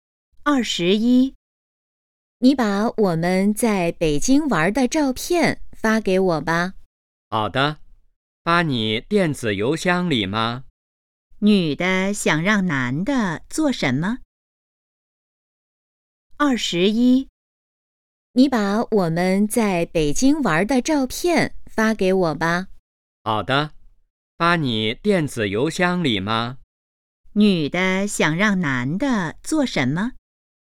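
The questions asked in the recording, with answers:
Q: 女的想让男的做什么?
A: 把在北京玩的照片发给她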